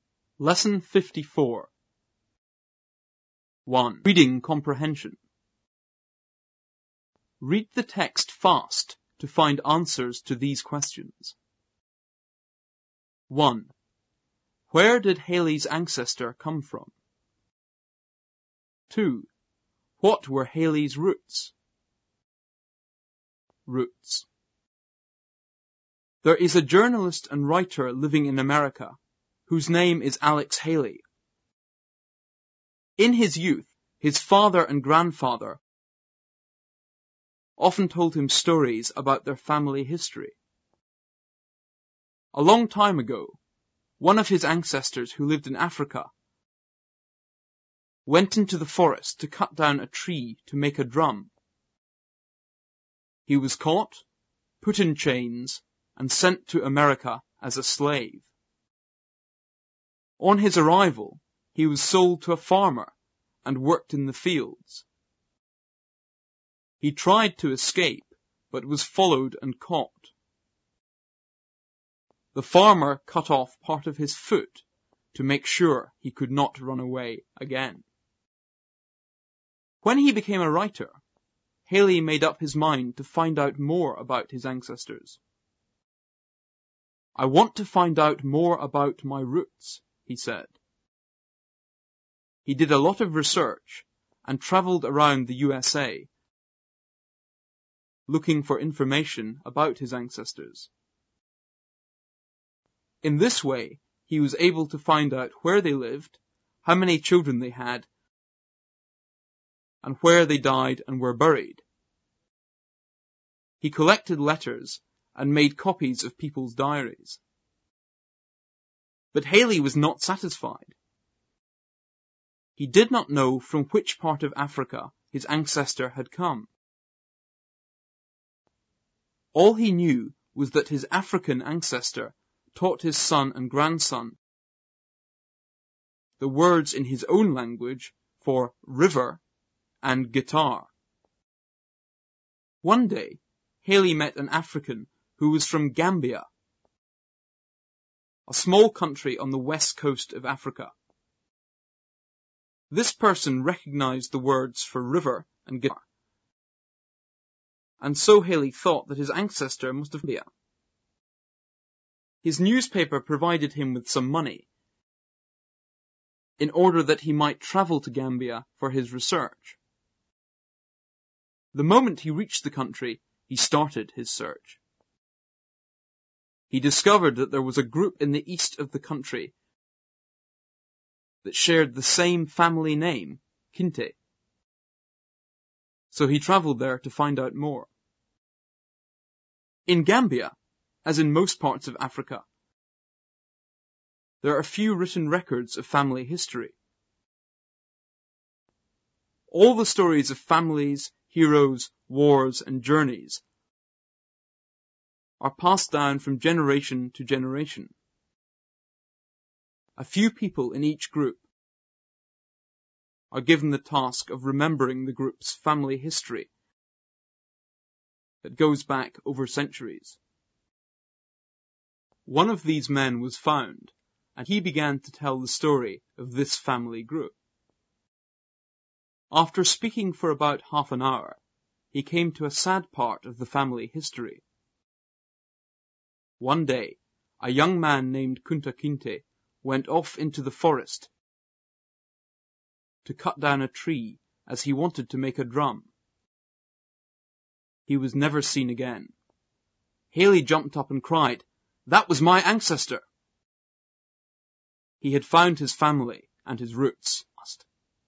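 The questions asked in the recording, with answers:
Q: Where did Haley's ancestor come from?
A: Gambia, on the west coast of Africa

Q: What were Haley's roots?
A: His ancestor Kunta Kinte and the Kinte family group in Gambia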